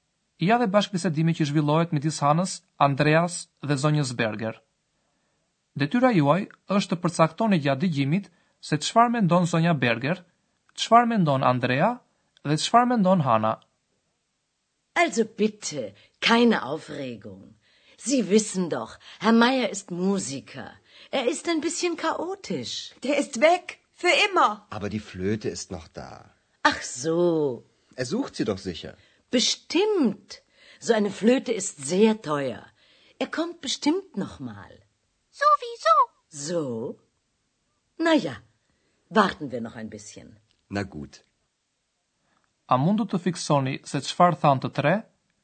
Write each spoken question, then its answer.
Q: Detyra juaj është të përcaktoni gjatë digjimit se qfar mendon Zonja Berger – Schwar Don Andrea, das Schwar Don Hanna.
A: Zonja Berger mendon se Zoti Majer është pak kaotik si të gjithë muzikantët.